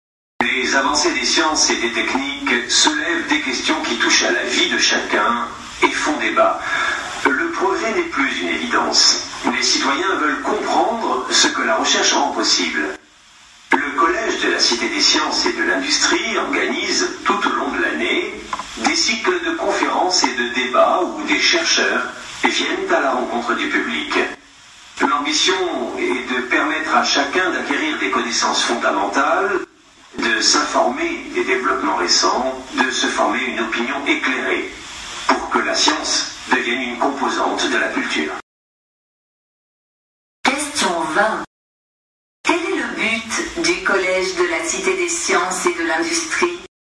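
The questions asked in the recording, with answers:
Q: Quel est le but du Collège de la Cité des Sciences et de l'Industrie ?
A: Permettre à chacun d'acquérir des connaissances scientifiques et de se former une opinion éclairée, pour que la science fasse partie de la culture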